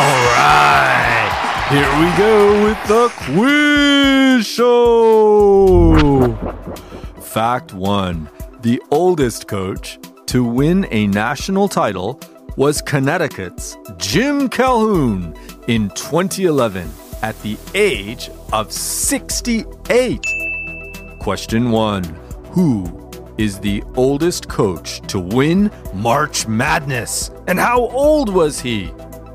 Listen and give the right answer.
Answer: Yes, the oldest coach to win a national title was Connecticut's Jim Calhoun in 2011 at the age of 68.